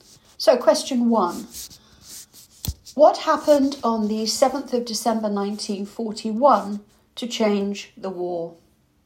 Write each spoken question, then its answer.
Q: What happened on the 7th of December 1941 to change the war?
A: the attack on Pearl Harbor.